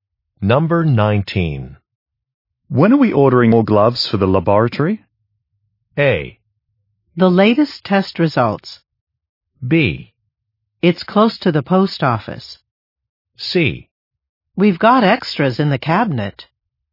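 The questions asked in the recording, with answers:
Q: When are we ordering more gloves for the laboratory?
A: C: We've got extras in the cabinet.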